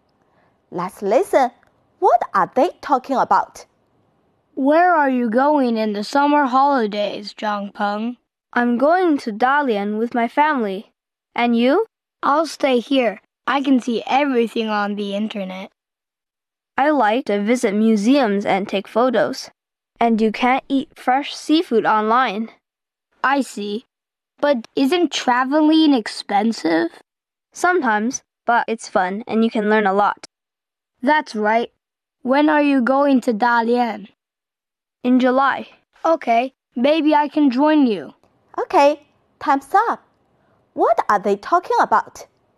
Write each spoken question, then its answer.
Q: What are they talking about?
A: They are talking about Zhang Peng's travel.